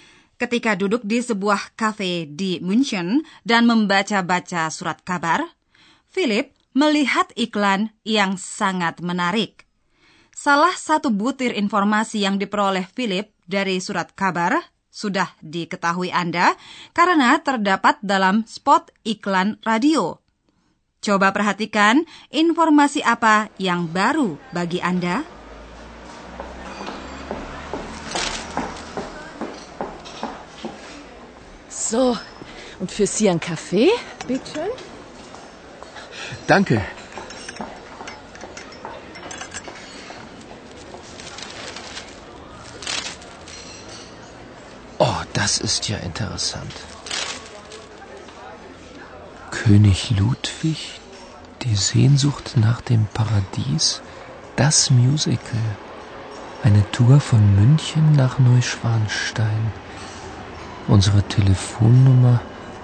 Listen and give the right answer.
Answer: Informasi yang baru bagi Anda, ada Biro Wisata yang mengadakan tur dari München ke Puri Neuschwanstein.